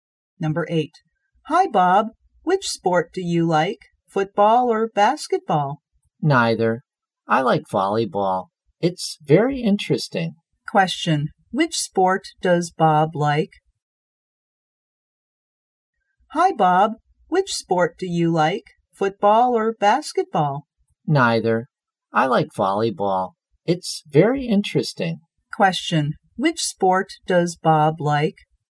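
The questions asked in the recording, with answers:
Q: Which sport does Bob like?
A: Volleyball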